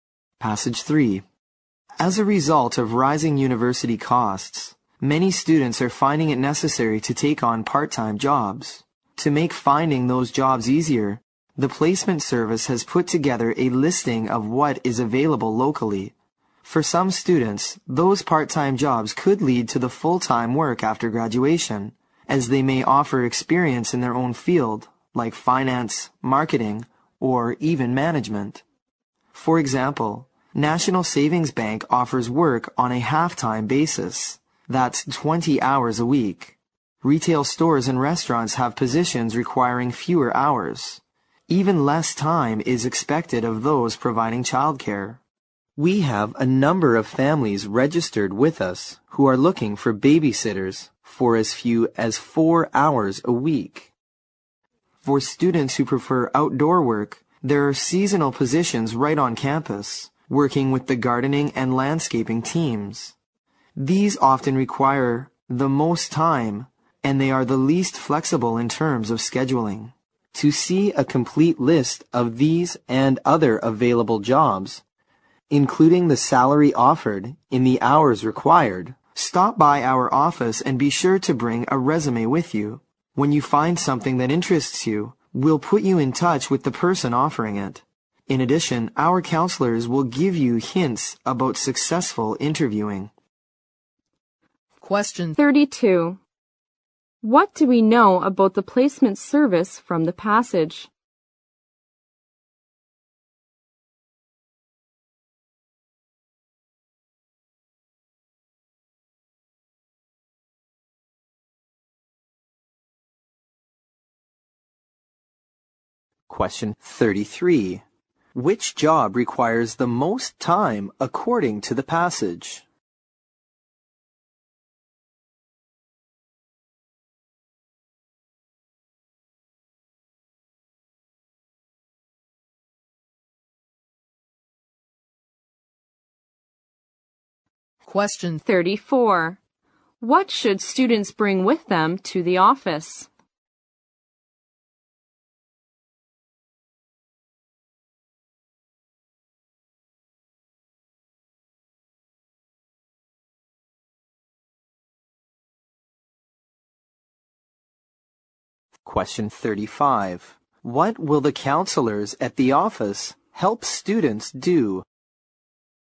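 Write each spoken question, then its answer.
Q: Which job requires the most time according to the passage?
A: Seasonal gardening and landscaping work on campus

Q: What should students bring with them to the office?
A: A resume

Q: What will the counselors at the office help students do?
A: Interview successfully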